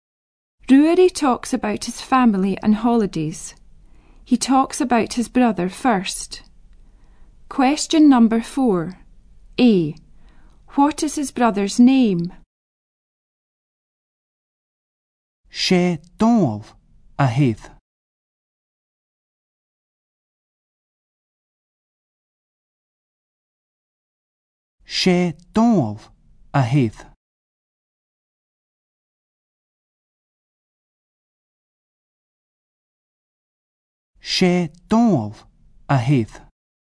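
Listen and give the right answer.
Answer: Donald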